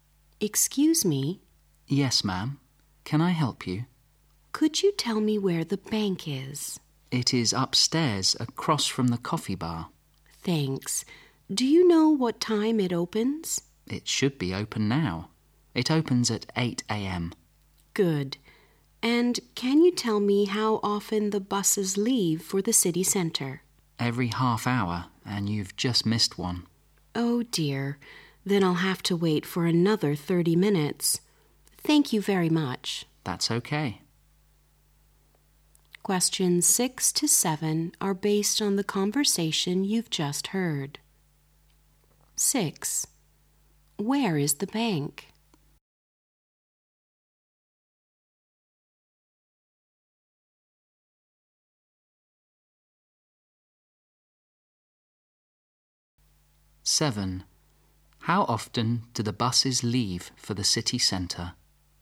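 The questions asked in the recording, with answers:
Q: Where is the bank?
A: Upstairs, across from the coffee bar.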